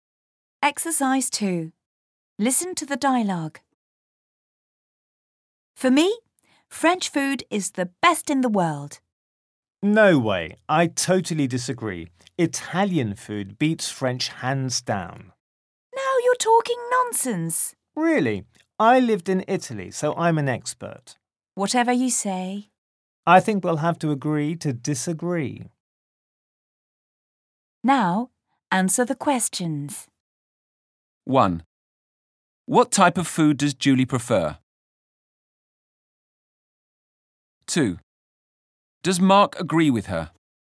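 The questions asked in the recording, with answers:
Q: Does Mark agree with her?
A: No, he disagrees (he prefers Italian food)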